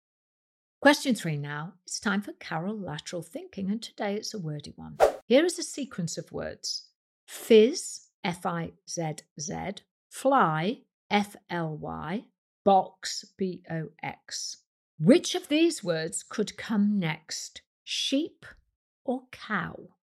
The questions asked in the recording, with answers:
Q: Which of these words could come next, sheep or cow?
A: And the answer is the word cow.